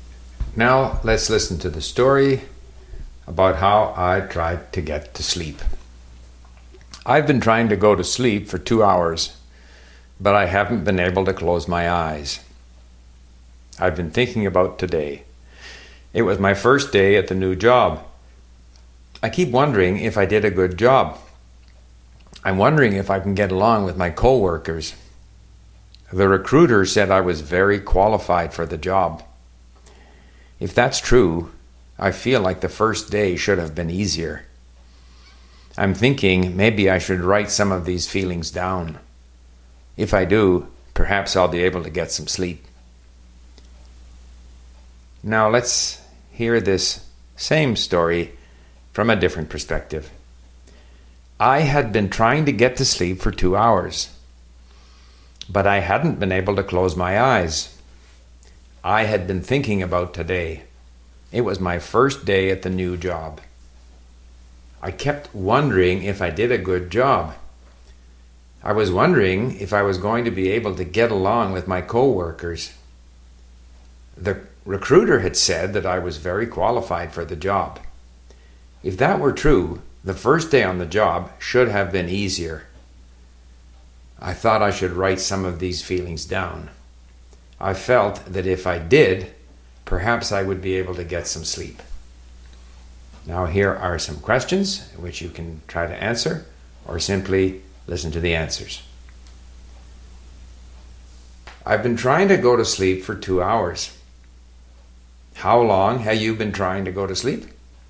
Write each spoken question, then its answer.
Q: How long have you been trying to go to sleep?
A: I've been trying to go to sleep for 2 hours.